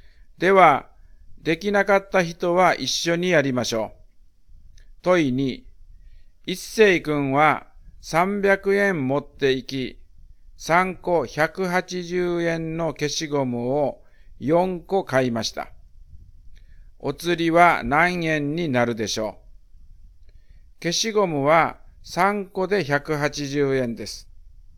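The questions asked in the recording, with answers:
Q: お釣りは何円になるでしょう?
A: 60円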